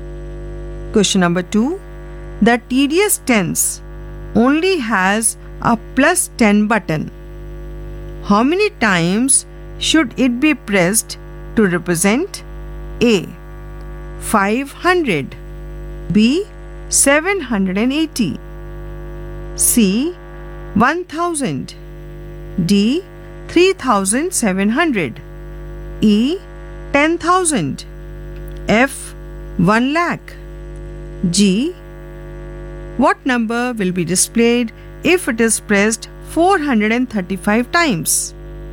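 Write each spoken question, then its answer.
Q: A. 500.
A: 50 times

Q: B. 780.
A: 78 times

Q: C. 1000.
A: 100 times

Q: 3700.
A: 370 times

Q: E. 10,000.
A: 1,000 times

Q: F. 1 lakh.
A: 10,000 times

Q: G. What number will be displayed if it is pressed 435 times?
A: 4,350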